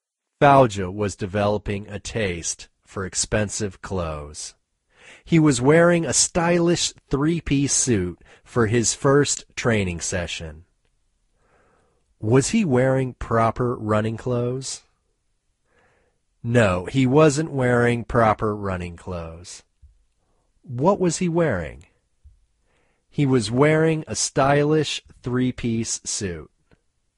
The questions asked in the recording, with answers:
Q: What was he wearing?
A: He was wearing a stylish three-piece suit.